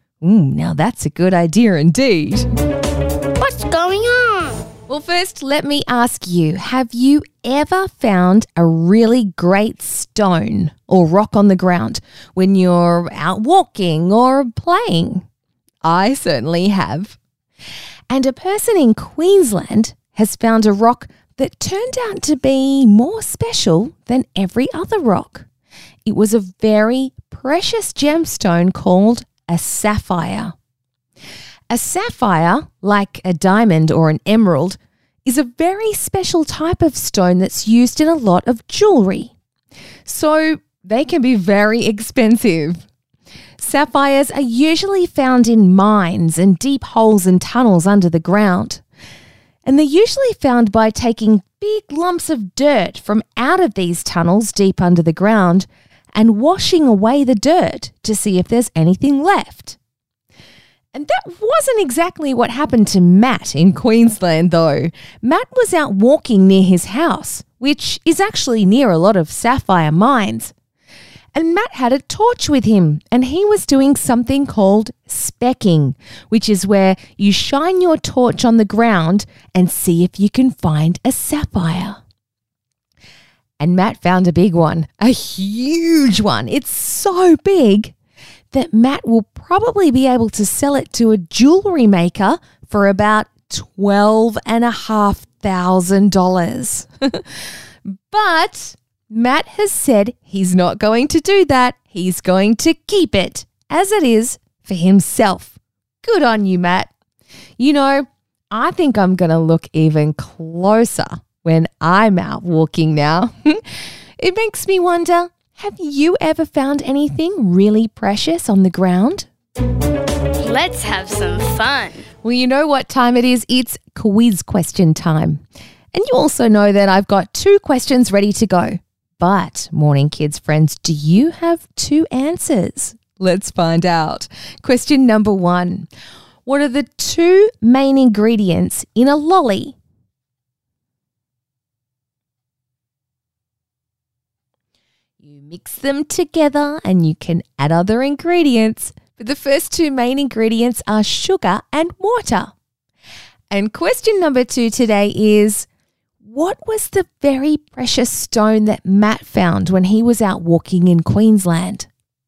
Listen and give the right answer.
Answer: Oh, yes, it was a sapphire.